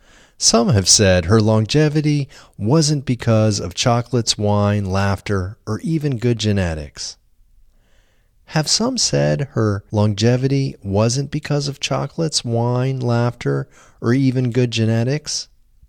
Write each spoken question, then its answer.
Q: Have some said her longevity wasn't because of chocolates, wine, laughter, or even good genetics?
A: Yes, some have said her longevity wasn't because of chocolates, wine, laughter, or even good genetics.